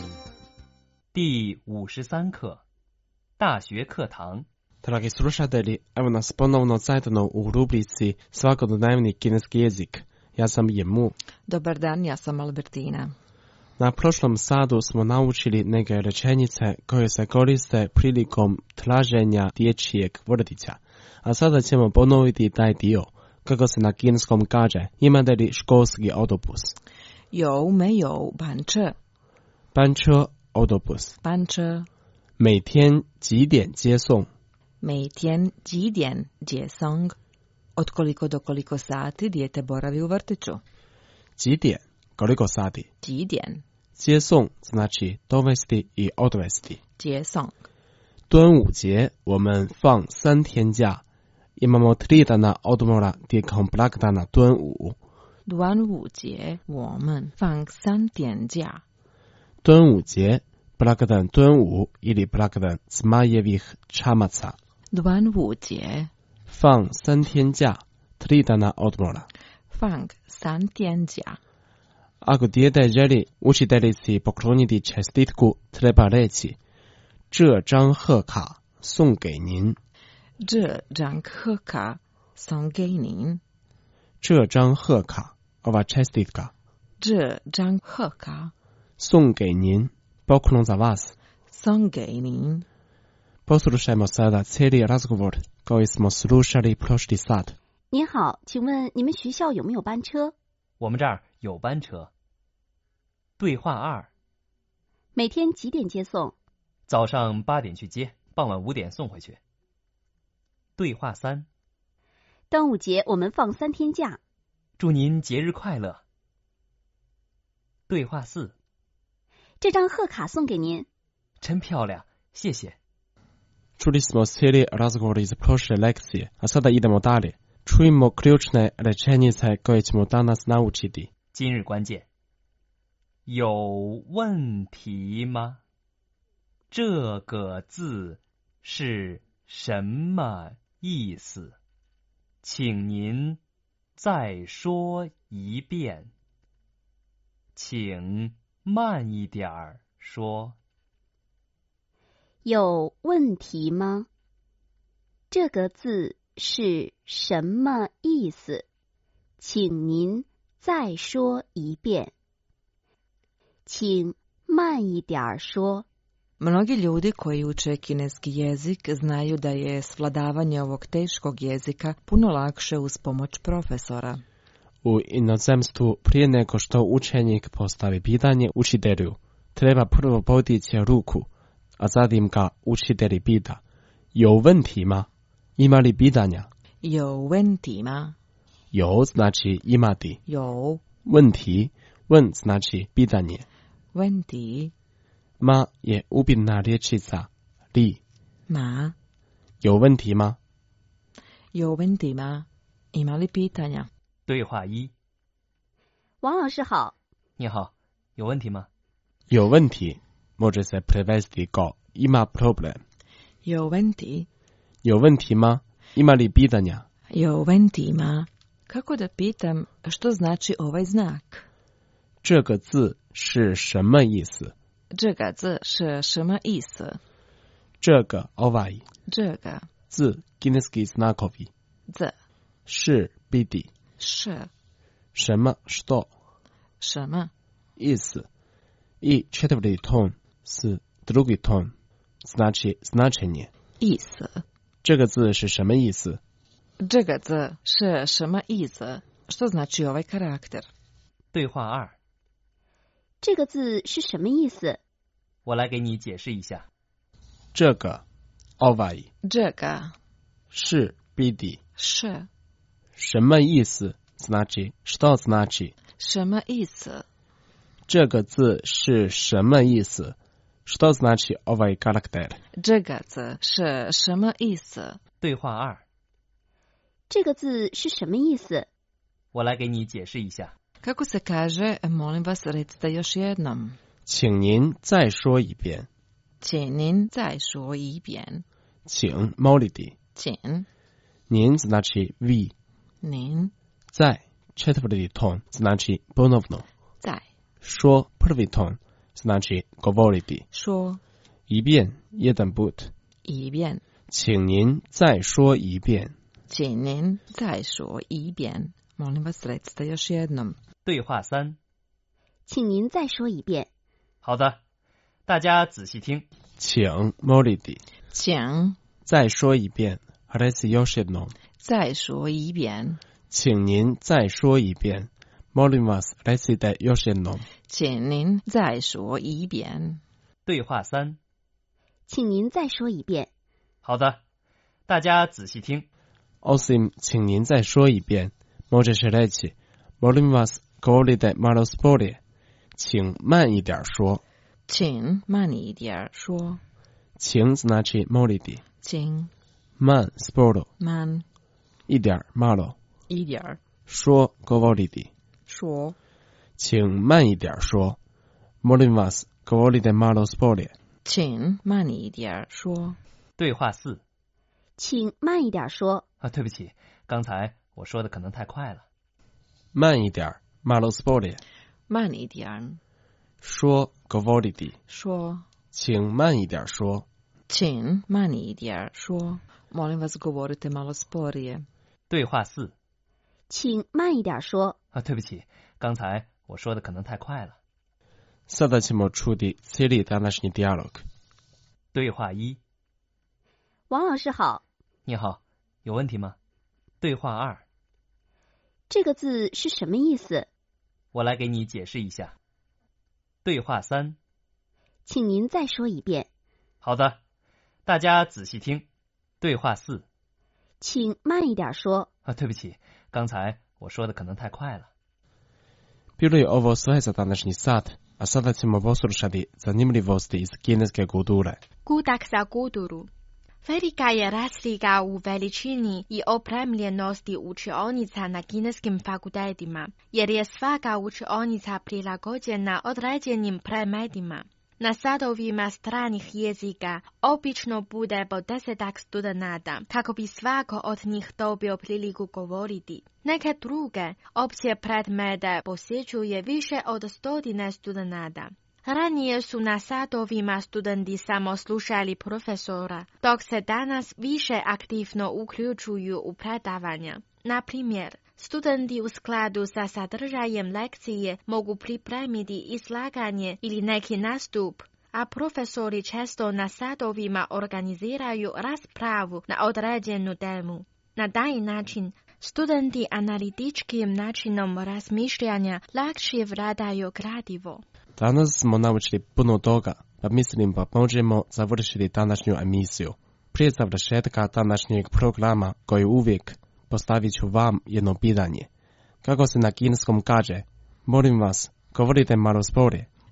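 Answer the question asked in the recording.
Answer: 请慢一点说 (Qing man yi dian shuo)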